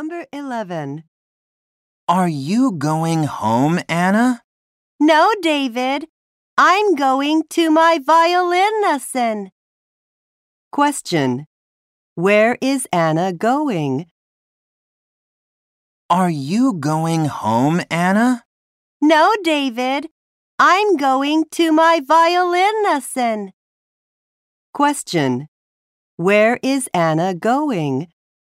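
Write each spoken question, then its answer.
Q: Where is Anna going?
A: To her violin lesson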